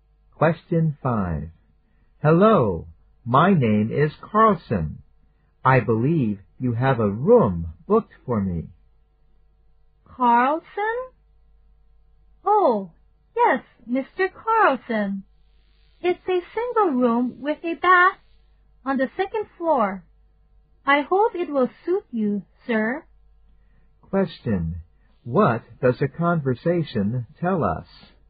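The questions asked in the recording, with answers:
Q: What does the conversation tell us?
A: Mr. Carlson has booked a single room with a bath on the second floor of a hotel.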